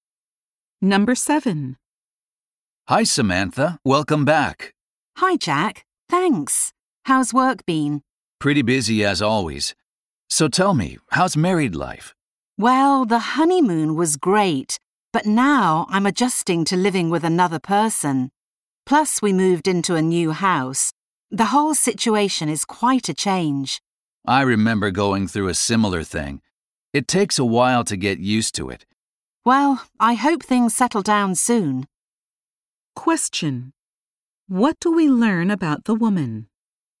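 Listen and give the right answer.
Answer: She recently got married and is adjusting to big changes.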